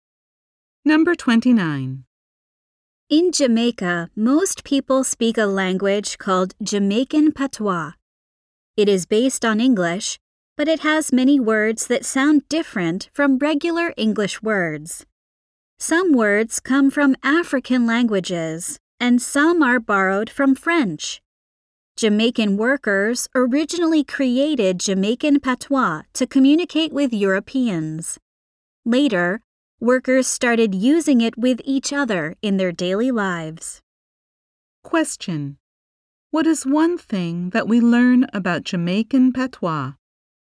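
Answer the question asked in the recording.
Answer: It has words borrowed from African languages and French.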